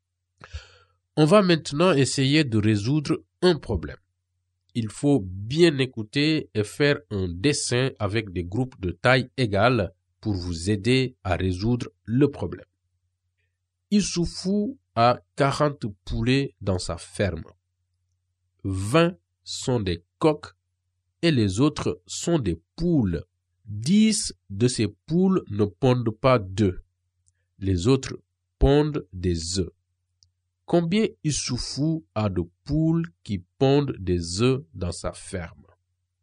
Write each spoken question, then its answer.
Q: Combien Issoufou a de poules qui pondent des œufs dans sa ferme?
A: la réponse au problème est que l'éleveur de poulets a 10 poules qui pondent.